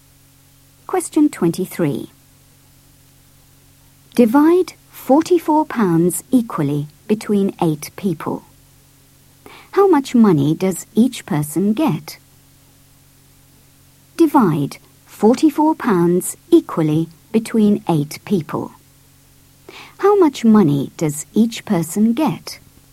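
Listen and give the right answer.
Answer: £5.50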